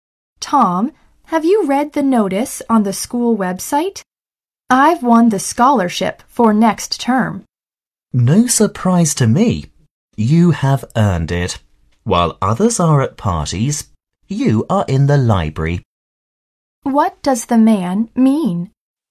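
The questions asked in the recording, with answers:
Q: What does the man mean?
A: The woman earned the scholarship by studying hard in the library.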